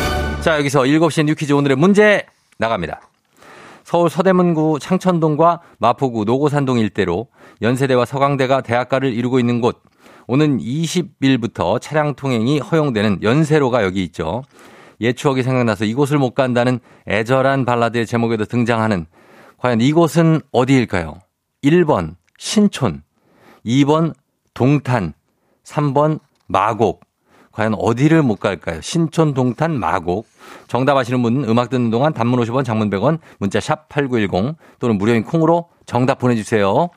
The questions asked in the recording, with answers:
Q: 옛 추억이 생각나서 이곳을 못 간다는 애절한 발라드의 제목에도 등장하는 과연 이곳은 어디일까요?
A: 정말 1번 신촌입니다.